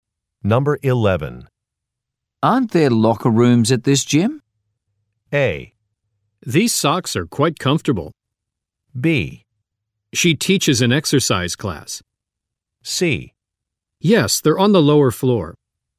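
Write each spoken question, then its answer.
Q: Aren't there locker rooms at this gym?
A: C: Yes, they're on the lower floor.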